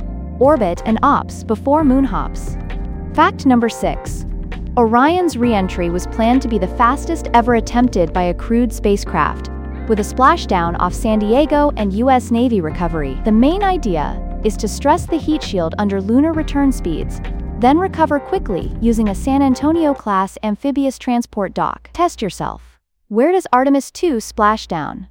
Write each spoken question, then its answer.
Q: Where does Artemis II splash down?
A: Correct answer. Off San Diego.